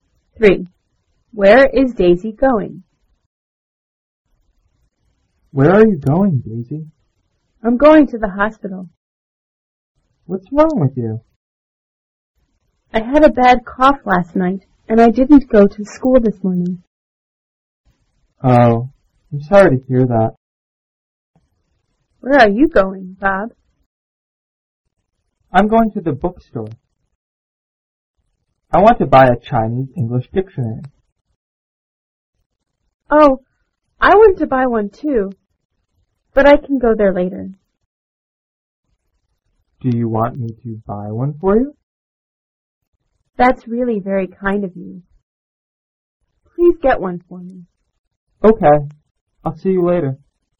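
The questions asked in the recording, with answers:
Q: Where is Daisy going?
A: To the hospital.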